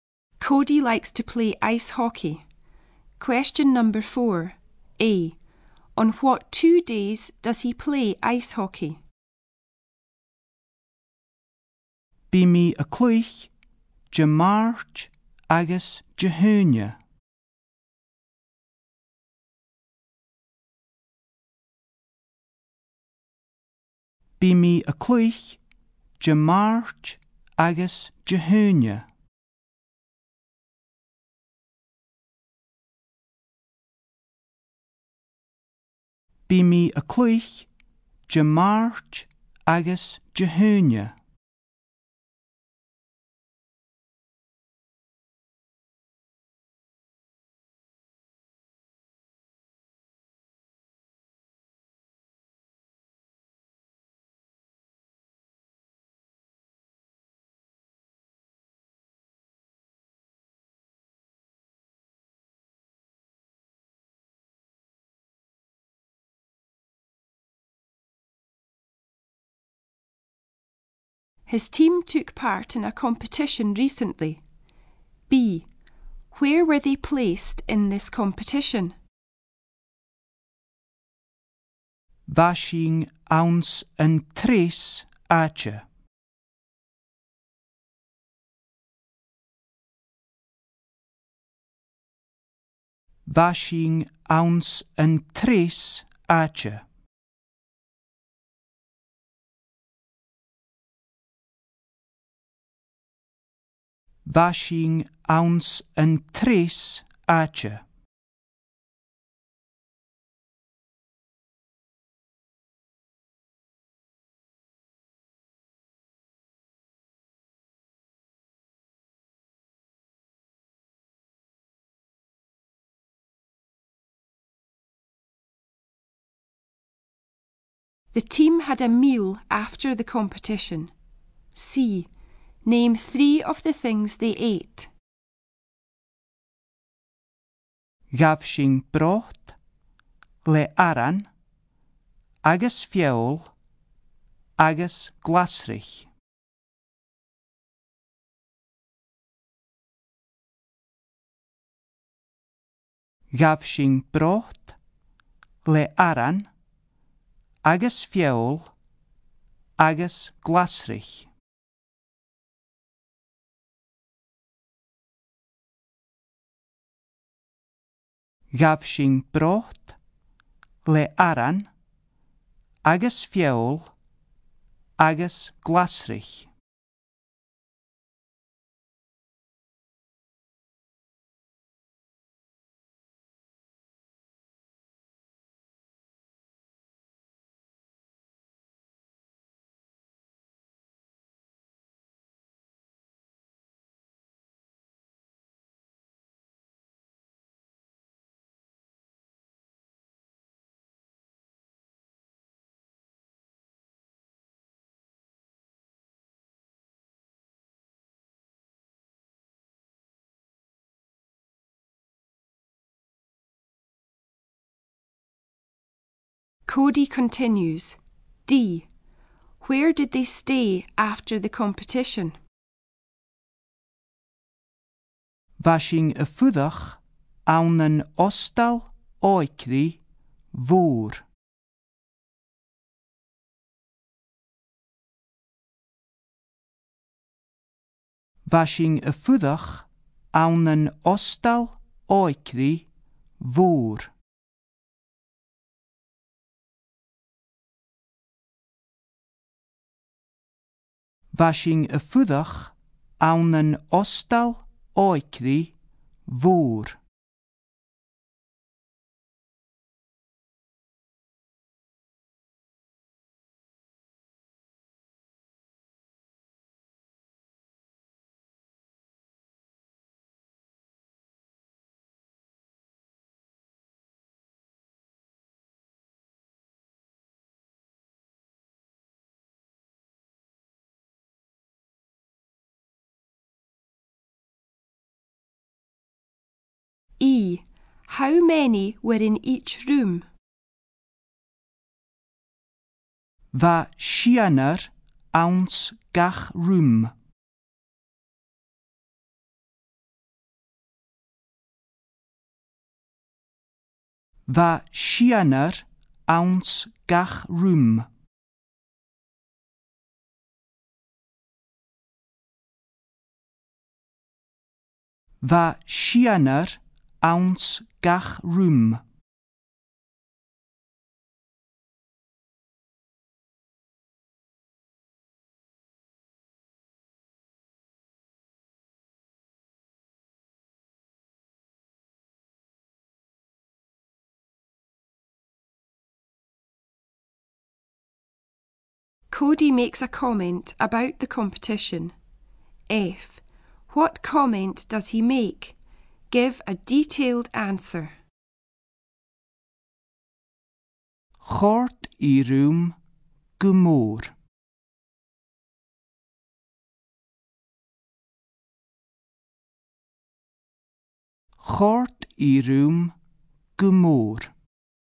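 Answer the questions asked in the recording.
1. Tuesday and Friday
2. Third
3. Soup, bread, meat, vegetables (any three)
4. In a big youth hostel
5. Six
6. He enjoyed it very much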